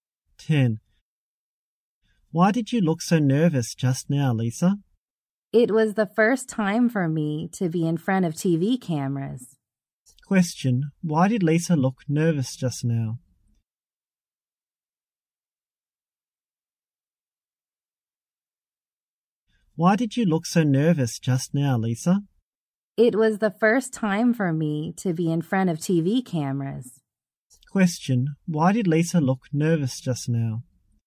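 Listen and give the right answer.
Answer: It was her first time in front of TV cameras.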